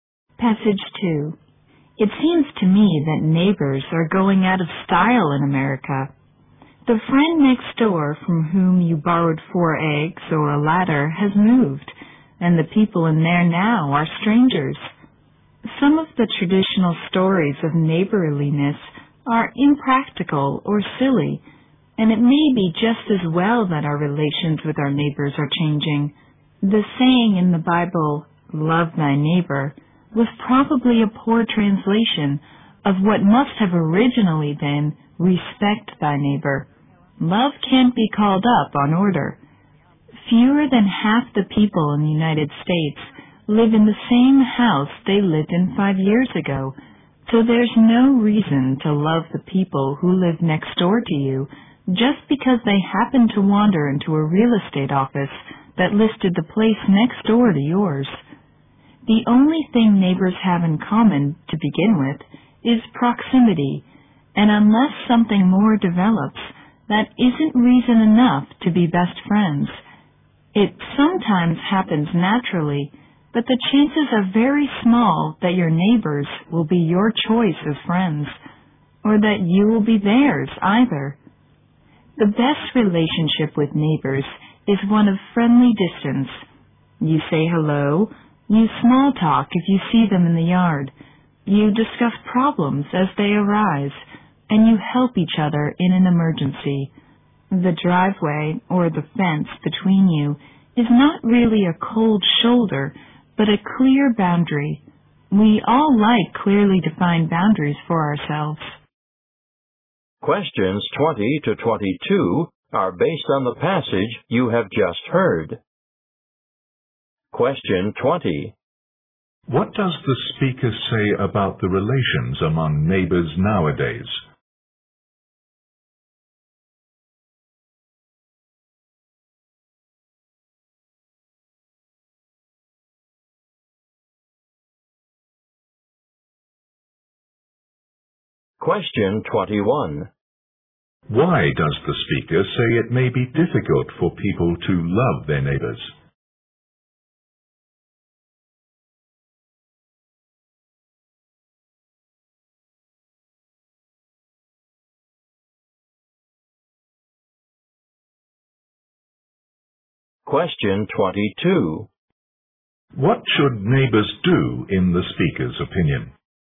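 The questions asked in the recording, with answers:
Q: What does the speaker say about the relations among neighbors nowadays?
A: They are changing; neighbors are often strangers.

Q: Why does the speaker say it may be difficult for people to love their neighbors?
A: People move often, so neighbors share only proximity.

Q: What should neighbors do in the speaker's opinion?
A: Keep a friendly distance.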